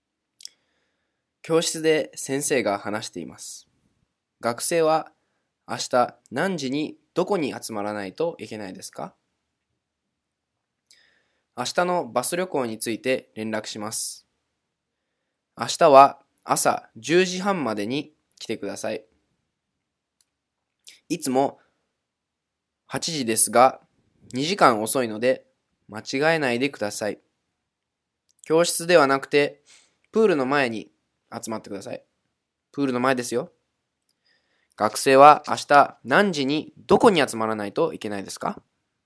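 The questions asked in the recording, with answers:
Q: 学生は明日何時にどこに集まらないといけないですか?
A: 10時半にプールの前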